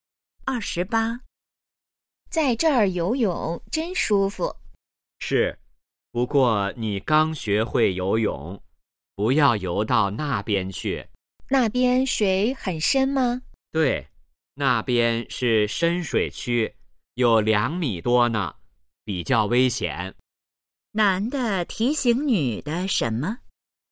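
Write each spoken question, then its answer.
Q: 男的提醒女的什么?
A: 不要游到深水区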